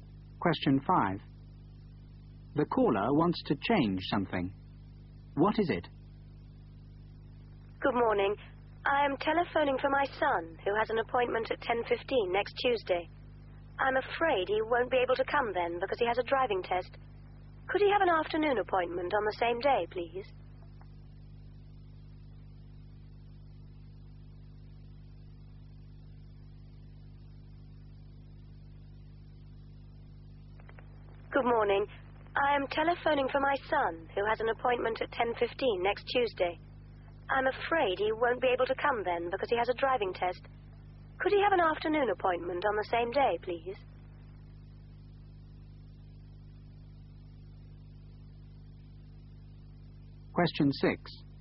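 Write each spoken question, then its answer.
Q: What is it?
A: The time of her son's appointment (10:15 next Tuesday) to an afternoon on the same day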